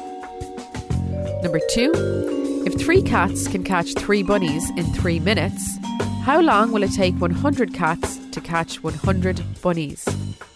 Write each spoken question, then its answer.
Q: If 3 cats can catch 3 bunnies in 3 minutes, how long will it take 100 cats to catch 100 bunnies?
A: The answer is 3 minutes.